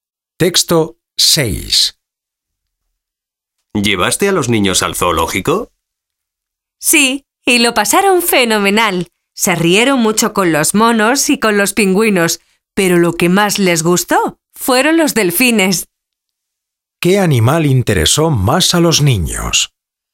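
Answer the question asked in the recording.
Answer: Los delfines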